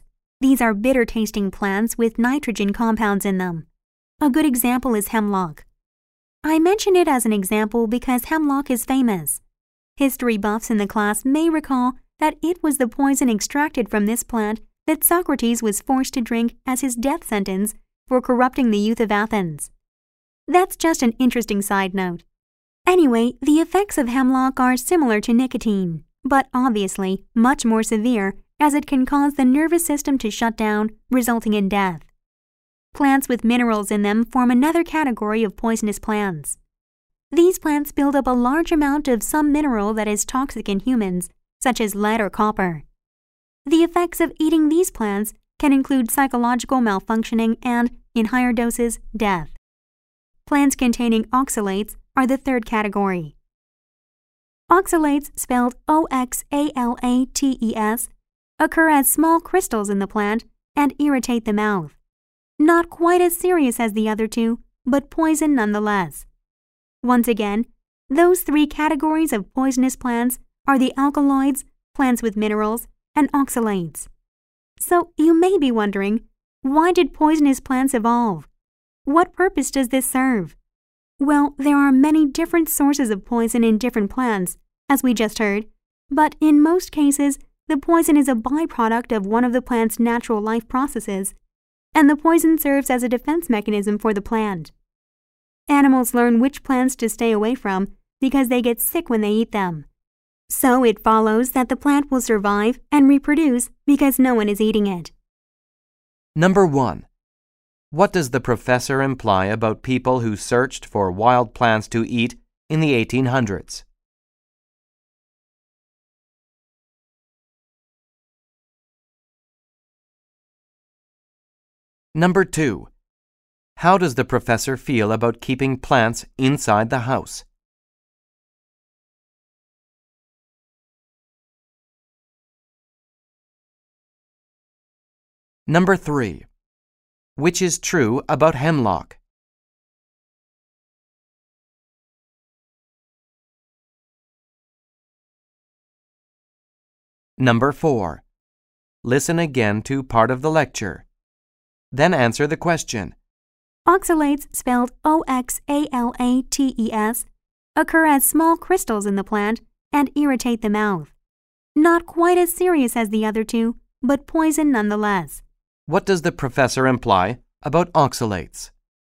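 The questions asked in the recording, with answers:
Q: What does the professor imply about oxalates?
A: They are less dangerous than the other two kinds of poisonous plants, but they are still poisonous.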